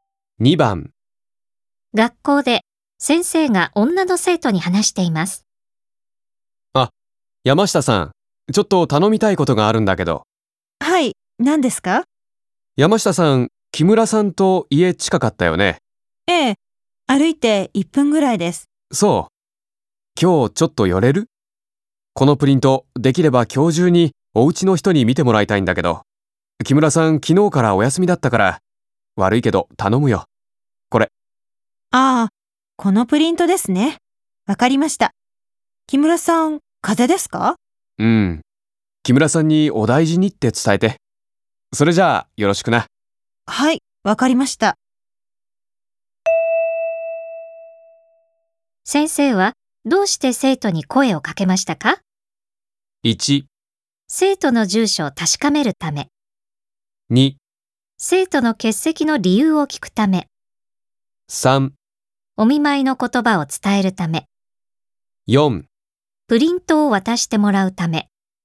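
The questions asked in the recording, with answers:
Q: 先生はどうして生徒に声をかけましたか?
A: 4: プリントを渡してもらうため。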